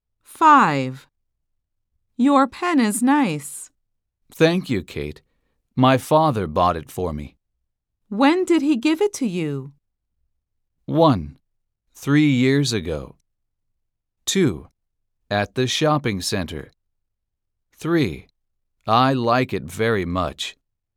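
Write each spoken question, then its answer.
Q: When did he give it to you?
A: 1: 3 years ago.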